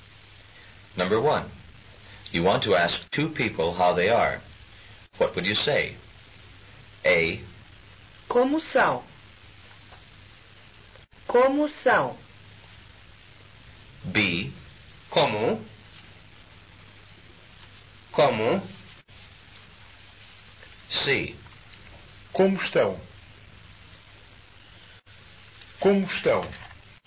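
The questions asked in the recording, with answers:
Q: You want to ask 2 people how they are.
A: C: Como estão?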